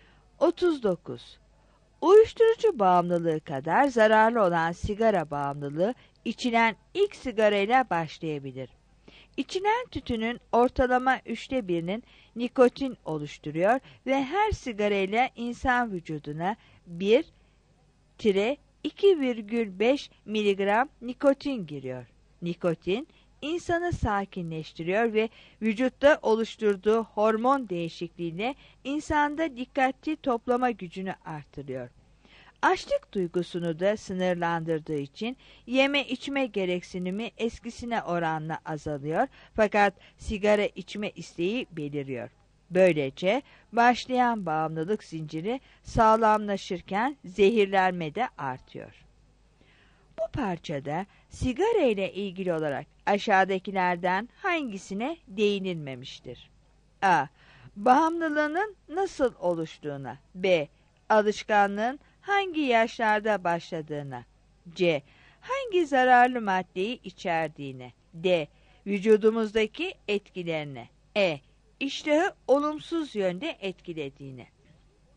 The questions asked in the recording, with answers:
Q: Bu parçada sigara ile ilgili olarak aşağıdakilerden hangisine değinilmemiştir?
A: 39 B